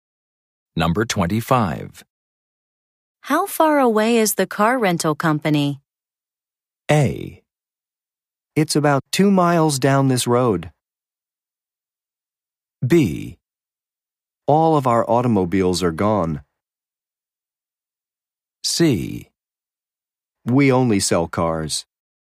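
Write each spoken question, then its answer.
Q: How far away is the car rental company?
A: A: It's about 2 miles down this road.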